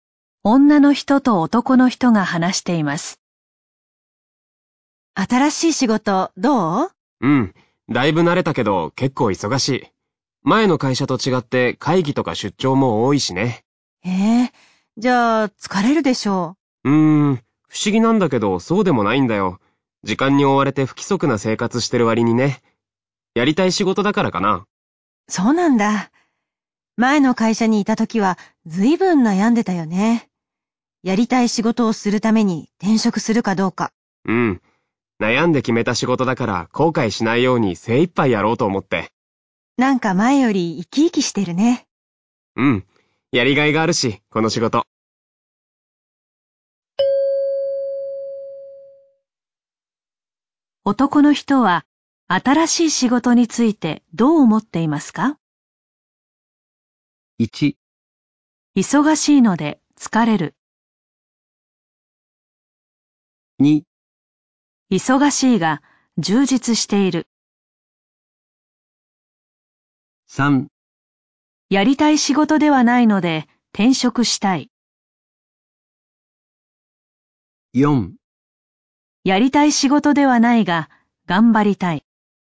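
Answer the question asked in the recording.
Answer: 2: 忙しいが充実している。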